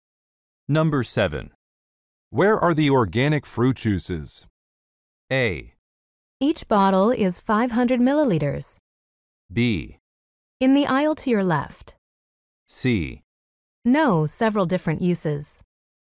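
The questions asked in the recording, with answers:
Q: Where are the organic fruit juices?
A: B: In the aisle to your left.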